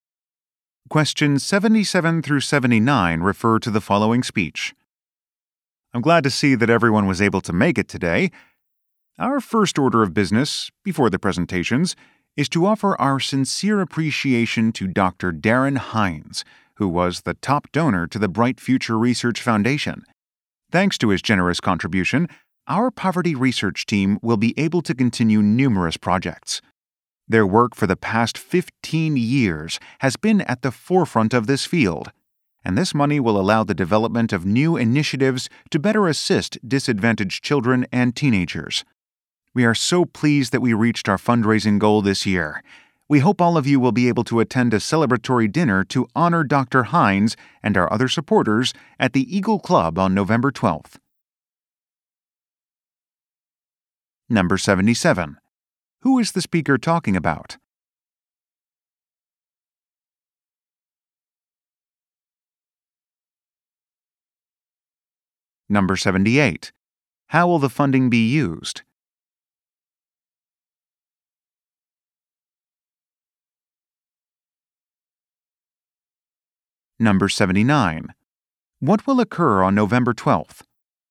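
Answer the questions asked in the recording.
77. A donor, Dr. Darren Hines
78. For poverty research to help disadvantaged children
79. A celebratory dinner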